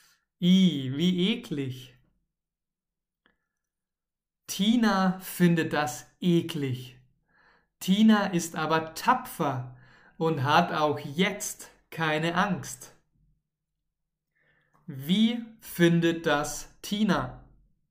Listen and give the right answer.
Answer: Eklig. Sie findet das eklig.